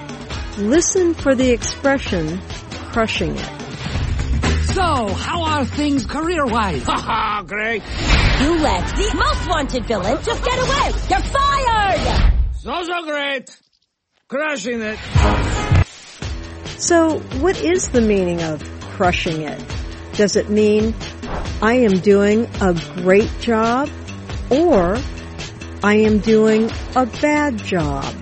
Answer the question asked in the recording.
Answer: Crushing it means I am doing a great job.